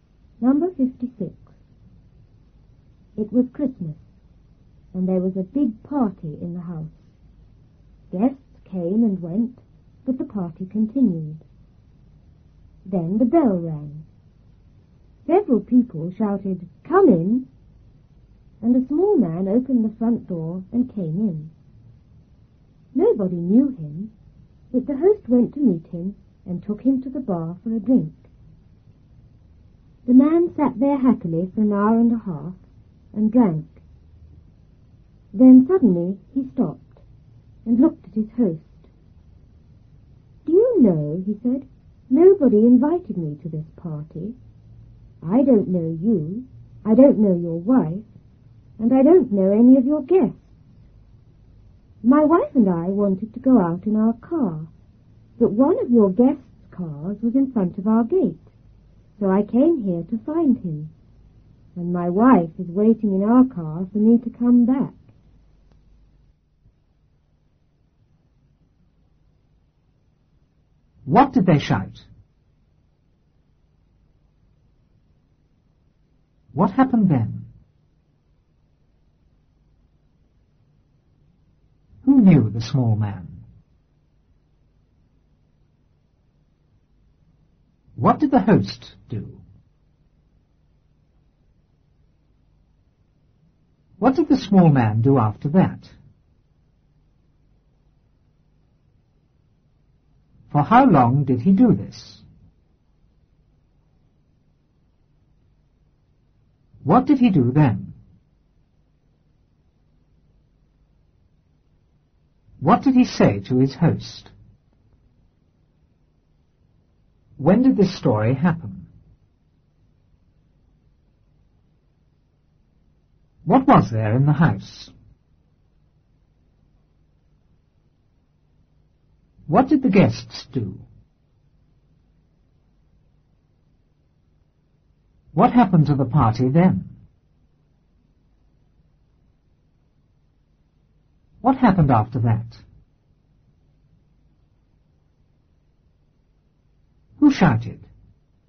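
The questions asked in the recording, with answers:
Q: What did they shout?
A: Come in!

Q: What happened then?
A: A small man opened the front door and came in.

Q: Who knew the small man?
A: Nobody

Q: What did the host do?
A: He went to meet him and took him to the bar for a drink.

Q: What did the small man do after that?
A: He sat there happily and drank.

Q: For how long did he do this?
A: An hour and a half

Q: What did he do then?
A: He suddenly stopped and looked at his host.

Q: What did he say to his host?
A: Nobody invited him; a guest's car was in front of his gate, so he came to find him.

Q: When did this story happen?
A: At Christmas

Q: What was there in the house?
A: A big party

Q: What did the guests do?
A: They came and went.

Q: What happened to the party then?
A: It continued.

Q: What happened after that?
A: The bell rang.

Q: Who shouted?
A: Several people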